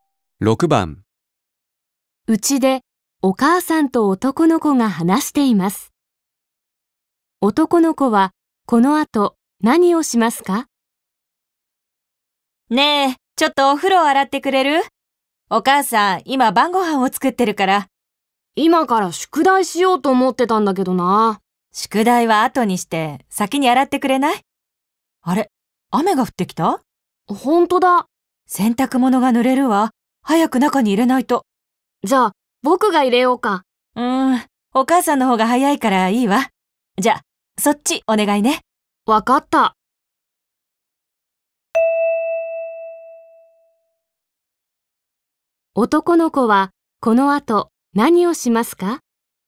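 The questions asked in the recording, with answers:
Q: 男の子はこの後何をしますか?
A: お風呂を洗う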